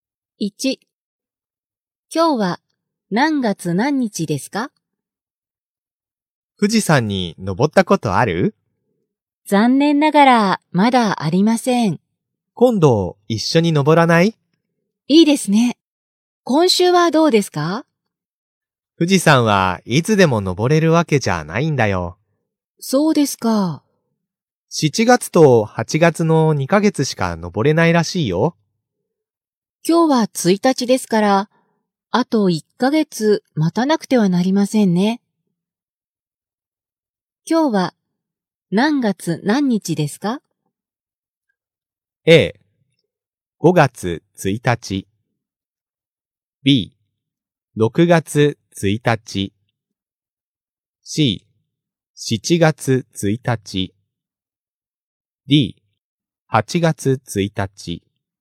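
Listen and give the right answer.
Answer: B: 6月1日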